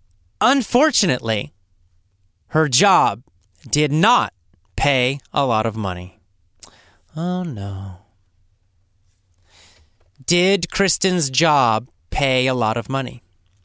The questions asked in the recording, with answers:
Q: Did Kristen's job pay a lot of money?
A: No, it didn't.